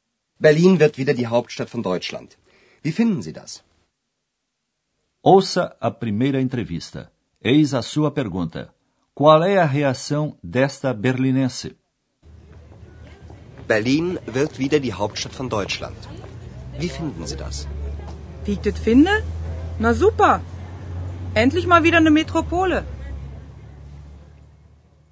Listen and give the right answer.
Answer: No mais autêntico dialeto berlinense, ela manifesta o seu entusiasmo.